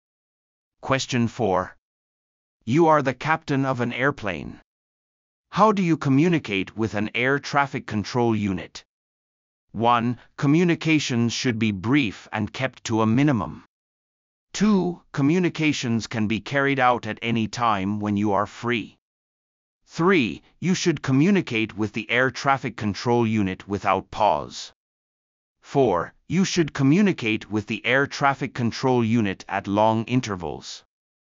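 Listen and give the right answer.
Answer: 1: Communications should be brief and kept to a minimum.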